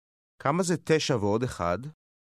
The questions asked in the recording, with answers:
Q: כמה זה 9 ועוד 1?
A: 10.